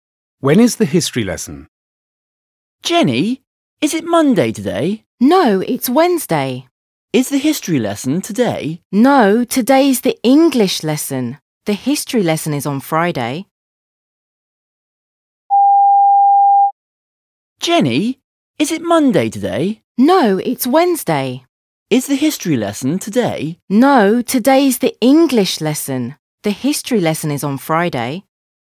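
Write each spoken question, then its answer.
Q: When is the history lesson?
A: On Friday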